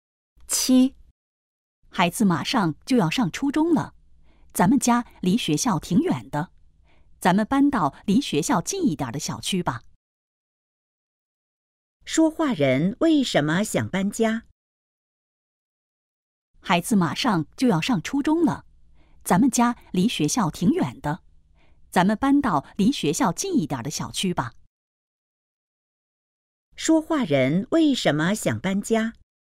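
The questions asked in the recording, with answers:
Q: 说话人为什么想搬家?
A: 家离孩子的学校太远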